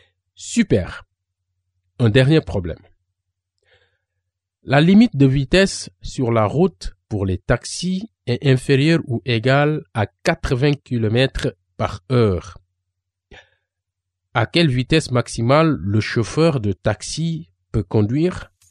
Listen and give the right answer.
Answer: Le maximum est 80 km par heure?